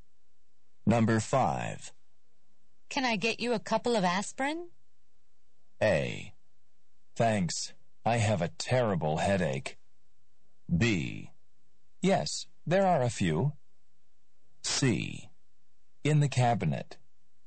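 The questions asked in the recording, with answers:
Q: Can I get you a couple of aspirin?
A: A: Thanks. I have a terrible headache.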